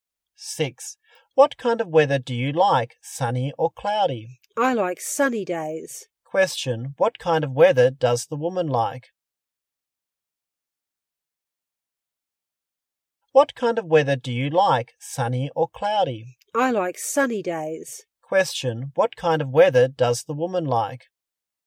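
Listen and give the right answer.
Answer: Sunny days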